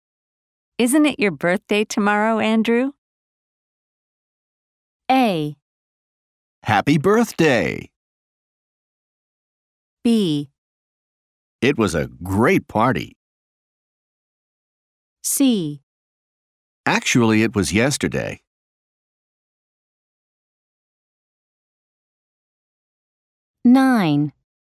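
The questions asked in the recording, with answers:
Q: Isn't it your birthday tomorrow, Andrew?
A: C: Actually, it was yesterday.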